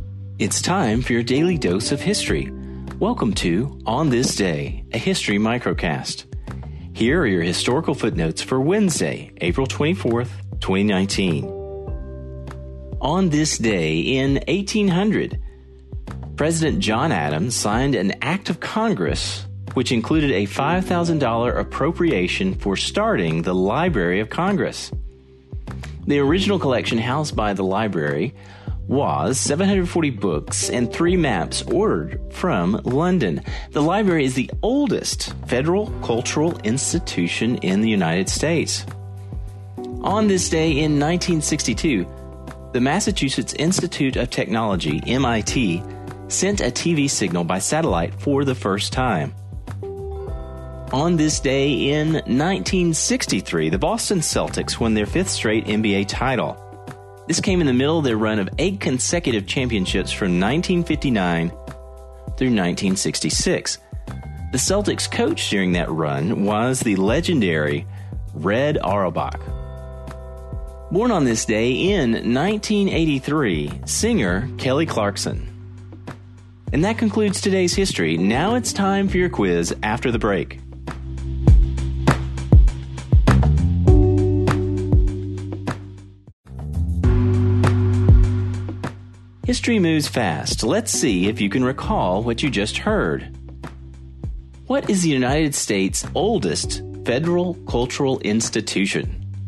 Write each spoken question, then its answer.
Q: What is the United States' oldest federal cultural institution?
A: the Library of Congress.